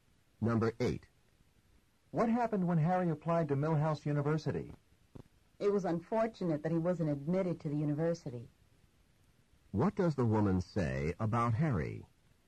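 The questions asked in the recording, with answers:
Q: What does the woman say about Harry?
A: Unfortunately, Harry was not admitted.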